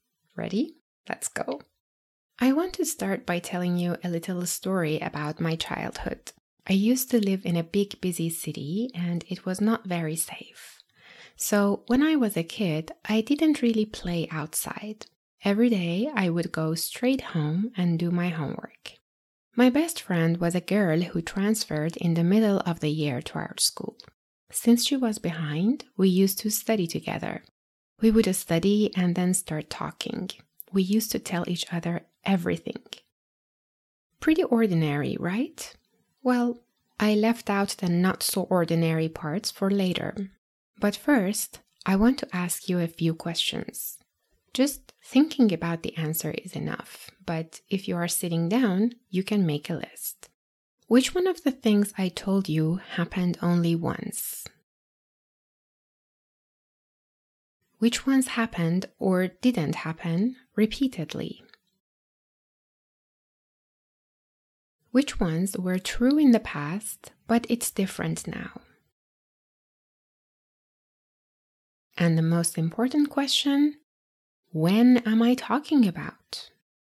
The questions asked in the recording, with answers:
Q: Which one of the things I told you happened only once?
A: My friend transferred only once.

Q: Which ones happened or didn't happen repeatedly?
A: Going home, doing homework, studying, and starting to talk all repeated day in, day out.

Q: Which ones were true in the past, but it's different now?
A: And now I don't live there anymore.

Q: And the most important question, when am I talking about?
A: And yes, that was all about my childhood.